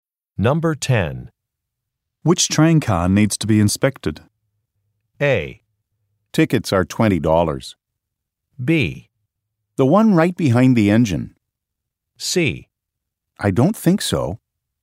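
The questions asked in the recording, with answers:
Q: Which train car needs to be inspected?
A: B: The one right behind the engine.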